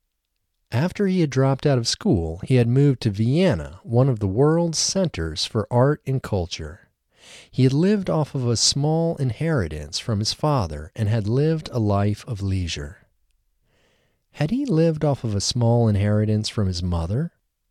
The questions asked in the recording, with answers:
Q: Had he lived off of a small inheritance from his mother?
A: No, he hadn't lived off of a small inheritance from his mother.